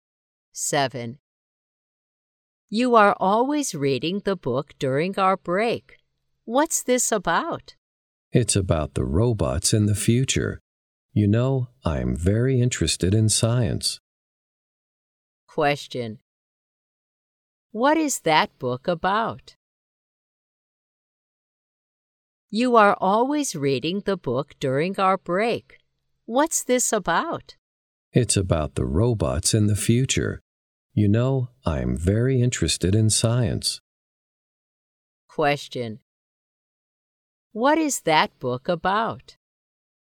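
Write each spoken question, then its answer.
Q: What is that book about?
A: Robots in the future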